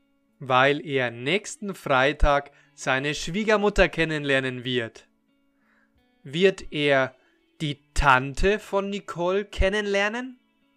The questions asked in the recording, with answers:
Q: Wird er die Tante von Nicole kennenlernen?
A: Nein, er wird nicht die Tante von Nicole kennenlernen, sondern seine Schwiegermutter.